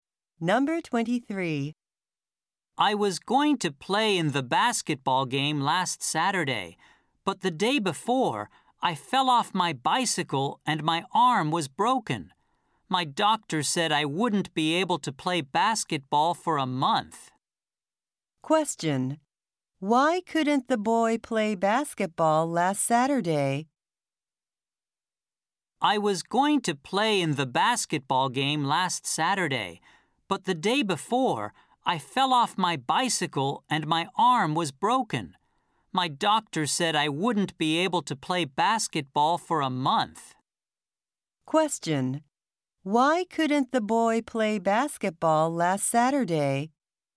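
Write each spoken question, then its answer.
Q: Why couldn't the boy play basketball last Saturday?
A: Because he fell off his bicycle and broke his arm.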